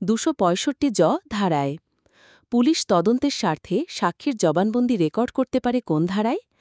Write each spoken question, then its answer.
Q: police তদন্তের স্বার্থে সাক্ষীর জবানবন্দি record করতে পারে কোন ধারায়?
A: ১৬১ ধারায়।